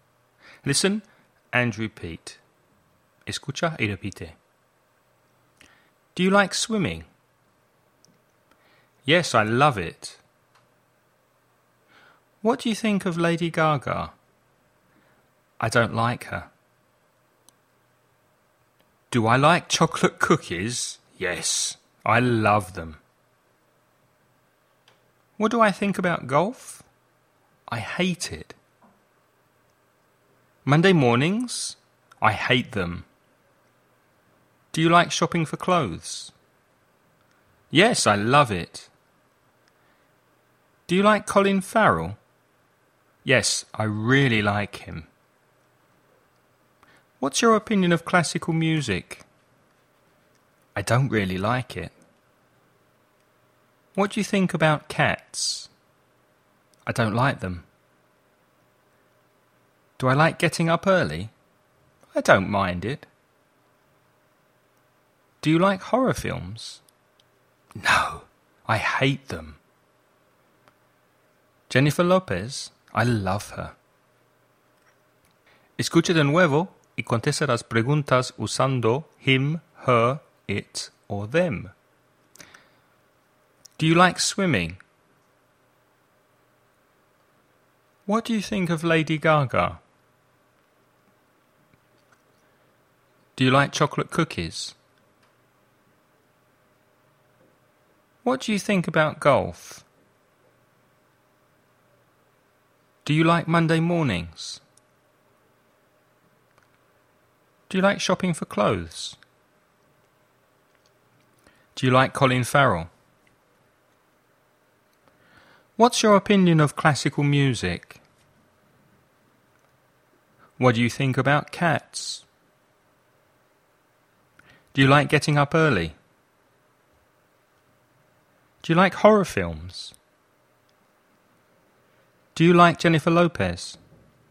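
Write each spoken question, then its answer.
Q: Do you like swimming?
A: Yes, I love it.

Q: What do you think of Lady Gaga?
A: I don't like her.

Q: Do you like chocolate cookies?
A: Yes, I love them.

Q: What do you think about golf?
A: I hate it.

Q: Do you like Monday mornings?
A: I hate them.

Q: Do you like shopping for clothes?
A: Yes, I love it.

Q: Do you like Colin Farrell?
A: Yes, I really like him.

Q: What's your opinion of classical music?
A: I don't really like it.

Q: What do you think about cats?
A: I don't like them.

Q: Do you like getting up early?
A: I don't mind it.

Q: Do you like horror films?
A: No, I hate them.

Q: Do you like Jennifer Lopez?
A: I love her.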